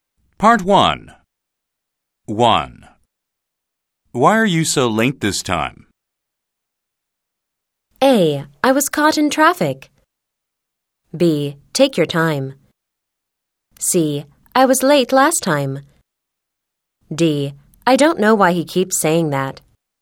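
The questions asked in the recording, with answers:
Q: Why are you so late this time?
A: A: I was caught in traffic.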